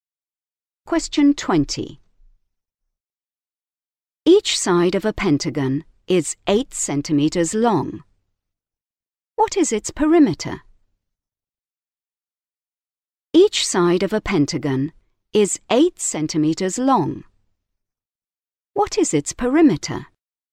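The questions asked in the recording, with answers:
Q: What is its perimeter?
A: 40 centimeters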